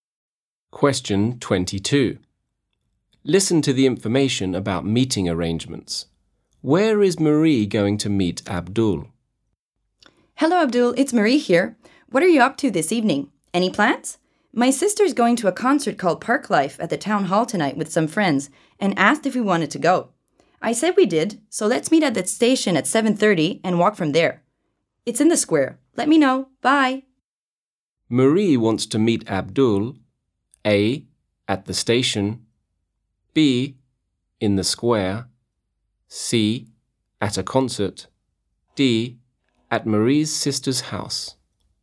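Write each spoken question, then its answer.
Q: Where is Marie going to meet Abdul?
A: A: at the station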